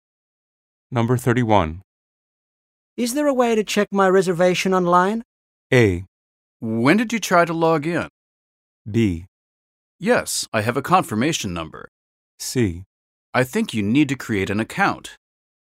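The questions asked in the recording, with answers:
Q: Is there a way to check my reservation online?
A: C: I think you need to create an account.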